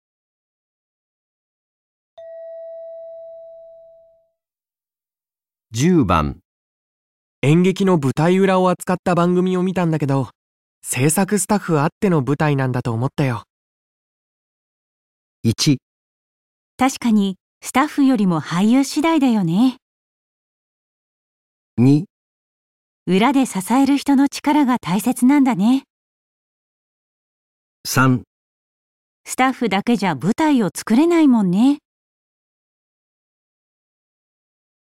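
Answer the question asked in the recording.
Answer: 裏で支えた人の力が大切なんだね

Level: N1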